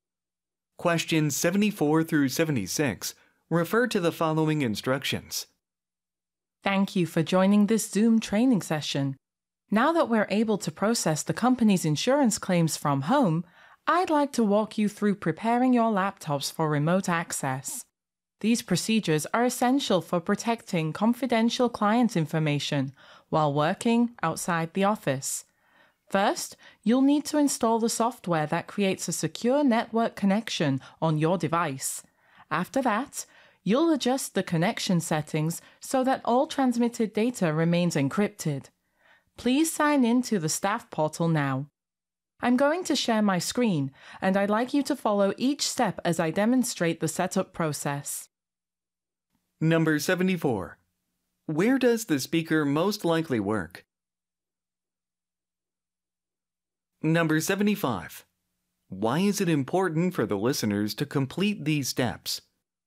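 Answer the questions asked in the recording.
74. At an insurance company
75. To protect confidential client information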